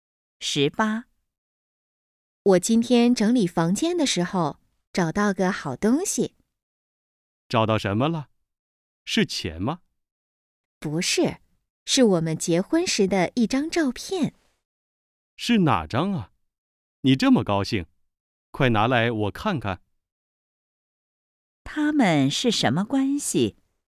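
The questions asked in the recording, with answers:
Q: 他们是什么关系?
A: 夫妻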